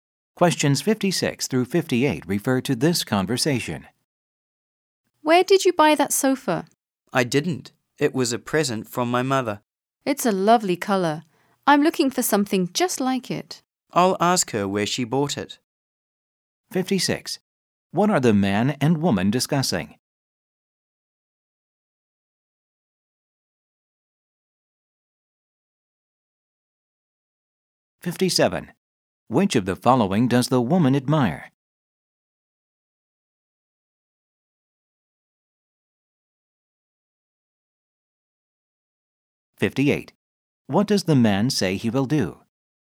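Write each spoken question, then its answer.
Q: What are the man and woman discussing?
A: A sofa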